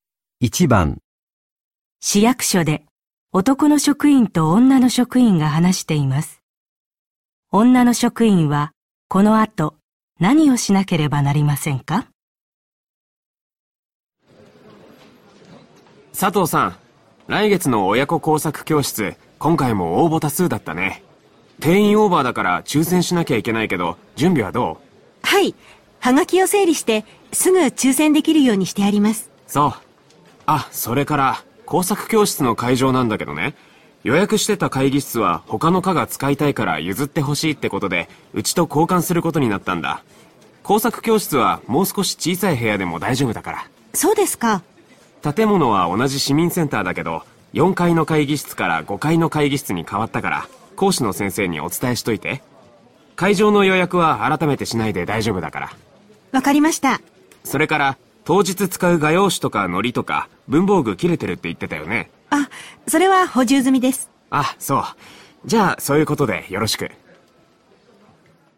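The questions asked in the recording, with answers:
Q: 女の職員はこの後何をしなければなりませんか?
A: 講師の先生に会場が4階から5階の会議室に変わったことを伝える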